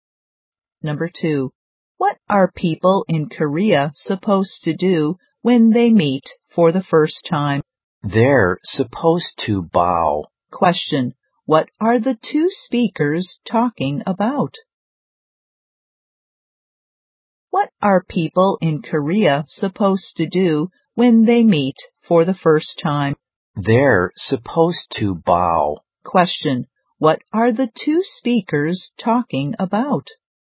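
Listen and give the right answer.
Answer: Greeting customs in Korea (bowing when meeting for the first time)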